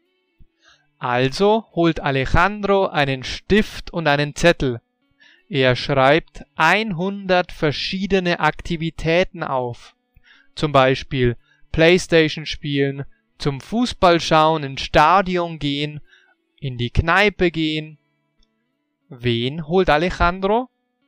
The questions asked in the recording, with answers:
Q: Wen holt Alejandro?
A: Einen Stift und einen Zettel.